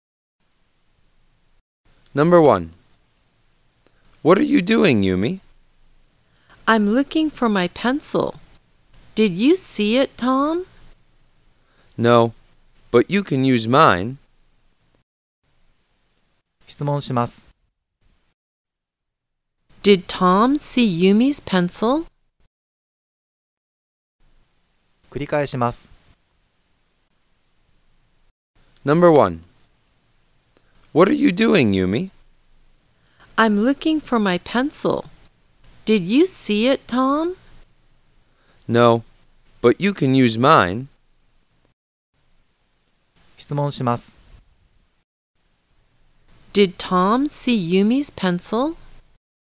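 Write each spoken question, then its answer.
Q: Did Tom see Yumi's pencil?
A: No, he didn't.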